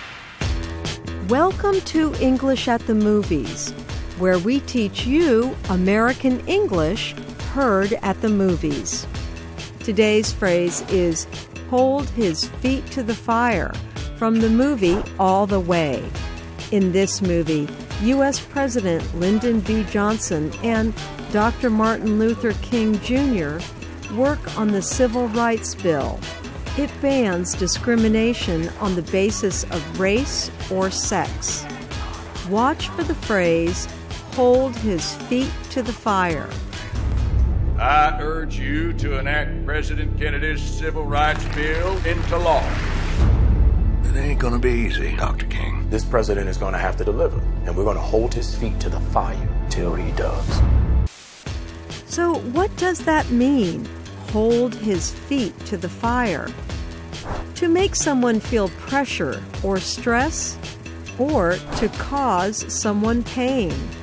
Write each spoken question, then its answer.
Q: So what does that mean, hold his feet to the fire?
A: To hold someone's feet to the fire means to make someone feel pressure or stress.